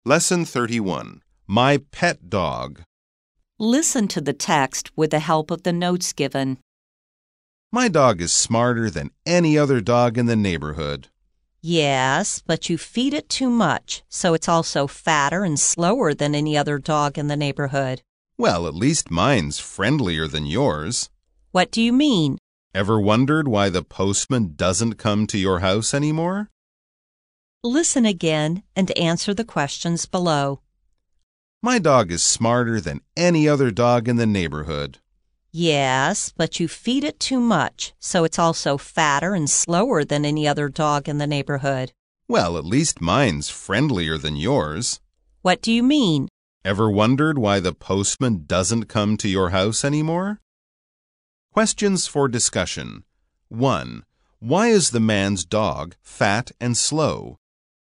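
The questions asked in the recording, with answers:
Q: Why is the man's dog fat and slow?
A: Because he feeds it too much.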